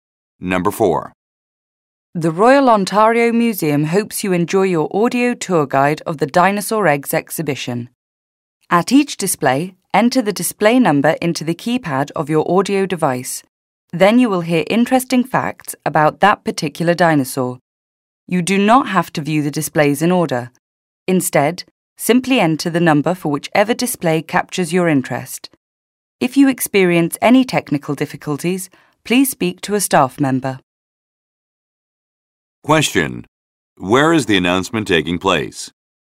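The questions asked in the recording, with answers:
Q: Where is the announcement taking place?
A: At the Royal Ontario Museum, in the Dinosaur Eggs exhibition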